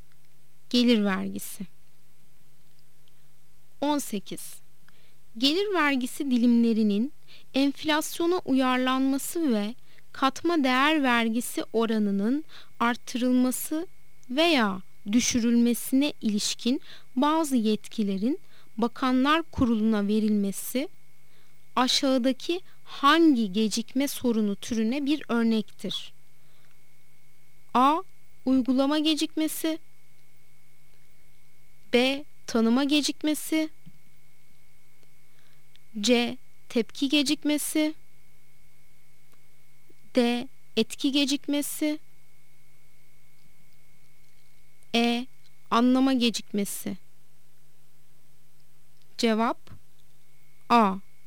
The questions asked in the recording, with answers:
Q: gelir vergisi dilimlerinin enflasyona uyarlanması ve katma değer vergisi oranının artırılması veya düşürülmesine ilişkin bazı yetkilerin Bakanlar Kurulu'na verilmesi aşağıdaki hangi gecikme sorunu türüne bir örnektir?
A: Cevap A. Uygulama gecikmesi.